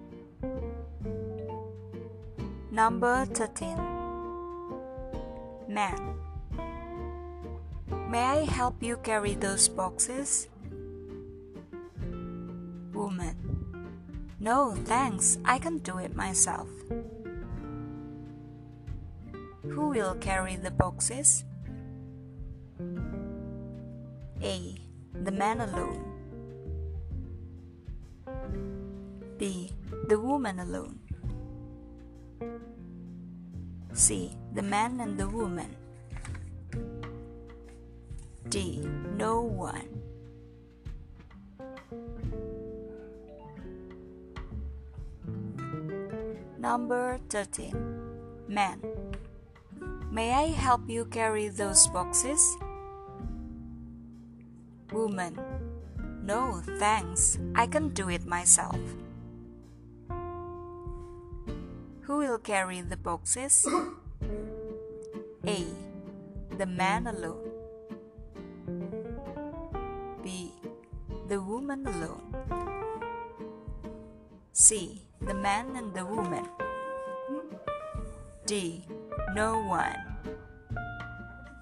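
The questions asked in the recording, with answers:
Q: Who will carry the boxes?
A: B: The woman alone.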